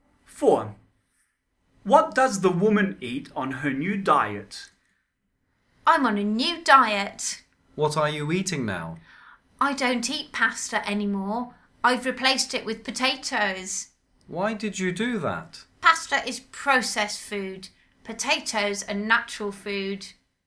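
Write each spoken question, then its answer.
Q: What does the woman eat on her new diet?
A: Potatoes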